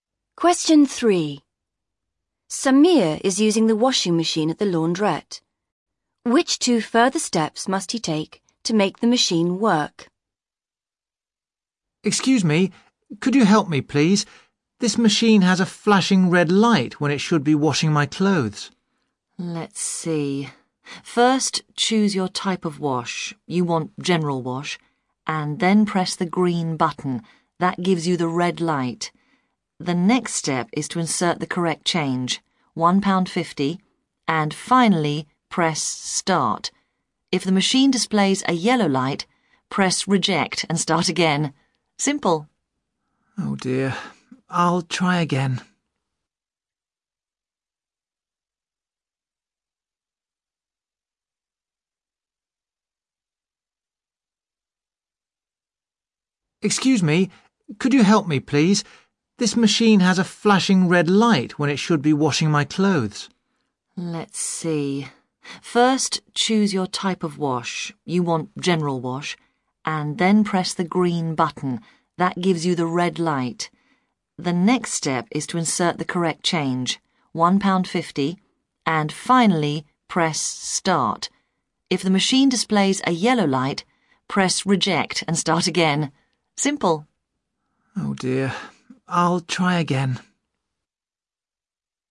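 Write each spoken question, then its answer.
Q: Which 2 further steps must he take to make the machine work?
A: Insert the correct change (£1.50) and press start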